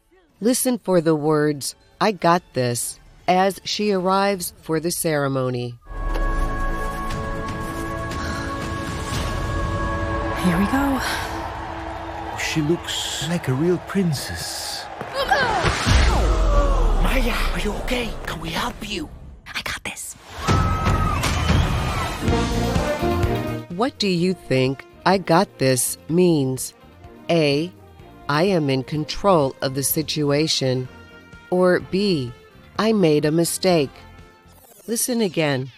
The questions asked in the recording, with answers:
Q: What do you think "I got this" means?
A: The answer is A. I am in control of the situation.